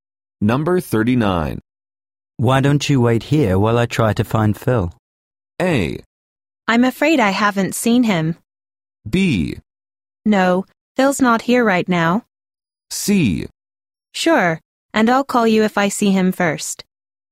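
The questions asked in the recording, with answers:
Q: Why don't you wait here while I try to find Phil?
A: C: Sure, and I'll call you if I see him first.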